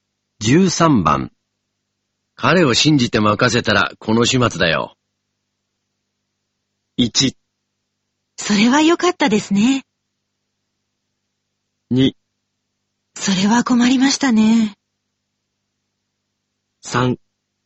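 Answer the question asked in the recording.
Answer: 2: それは困りましたね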